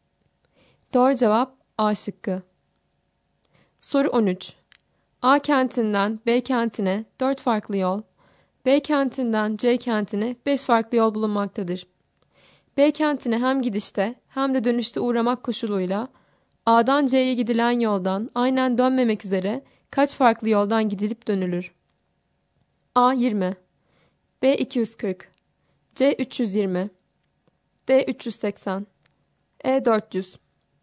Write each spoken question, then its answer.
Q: B kentine hem gidişte hem de dönüşte uğramak koşuluyla A'dan C'ye gidilen yoldan aynen dönmemek üzere kaç farklı yoldan gidilip dönülür?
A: Doğru cevap D şıkkı.